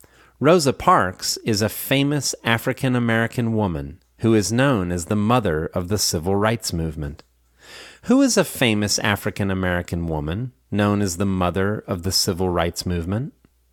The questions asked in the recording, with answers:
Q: Who is a famous African-American woman known as the mother of the civil rights movement?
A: Rosa Parks is a famous African-American woman who is known as the mother of the civil rights movement.